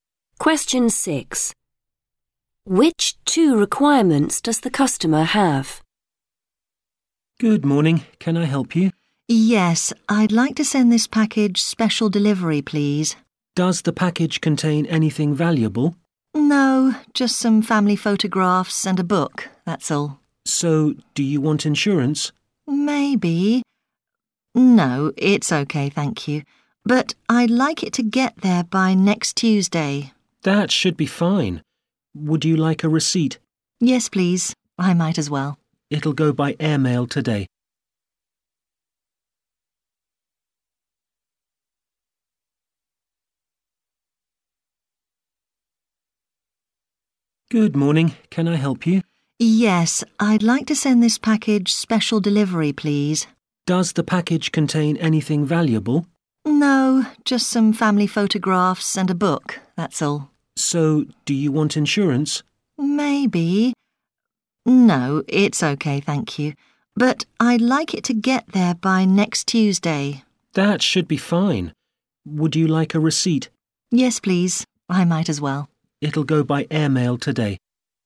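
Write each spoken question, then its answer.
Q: Which two requirements does the customer have?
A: Delivery by next Tuesday and a receipt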